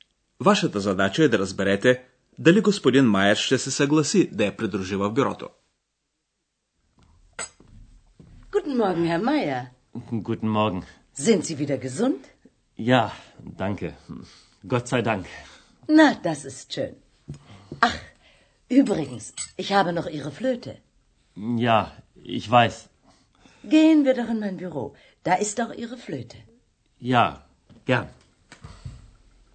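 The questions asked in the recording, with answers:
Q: Вашата задача е да разберете дали господин Майер ще се съгласи да я придружи в бюрото.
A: Да, ще се съгласи (Ja, gern).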